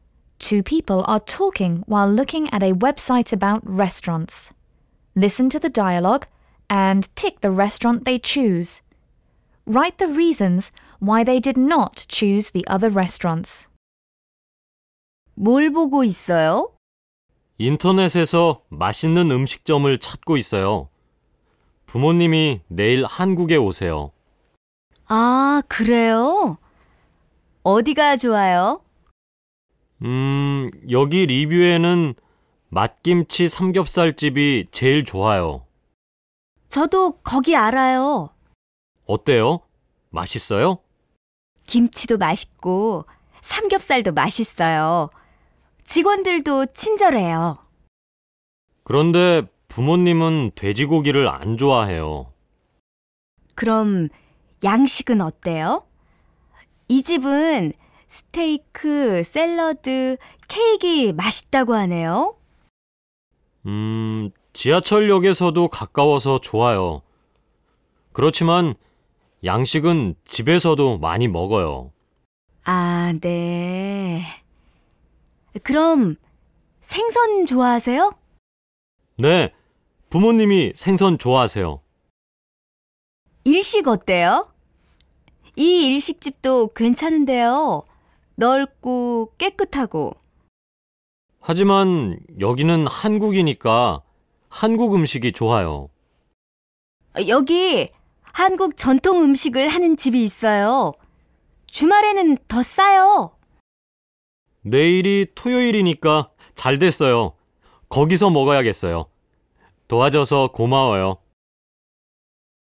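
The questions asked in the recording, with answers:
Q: Listen to the dialogue and tick the restaurant they choose.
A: The traditional Korean food restaurant

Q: Write the reasons why they did not choose the other restaurants.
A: Pork restaurant: parents don't like pork; Western restaurant: they eat Western food often at home; Japanese restaurant: they're in Korea, so Korean food is better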